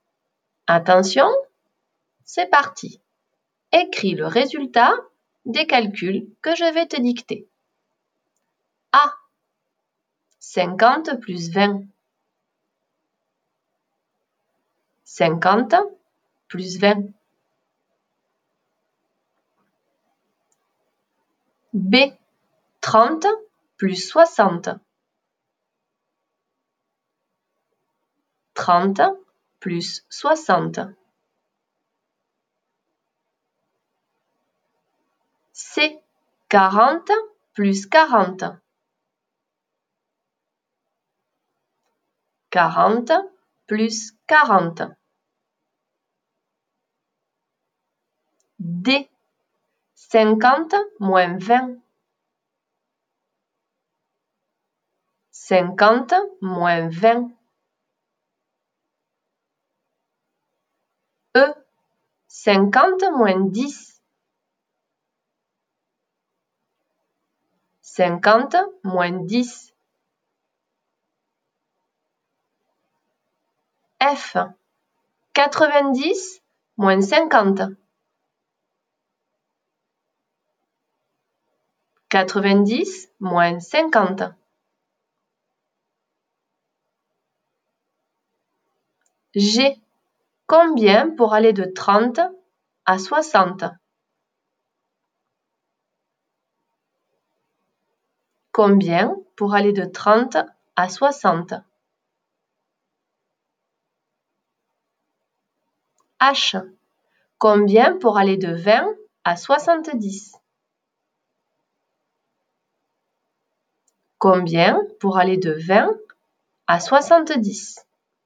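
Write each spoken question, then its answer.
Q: 50 plus 20.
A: 70

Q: 30 plus 60.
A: 90

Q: 40 plus 40.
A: 80

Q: 50 moins 20.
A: 30

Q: 50 moins 10.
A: 40

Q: 90 moins 50.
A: 40

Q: Combien pour aller de 30 à 60?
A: 30

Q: Combien pour aller de 20 à 70?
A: 50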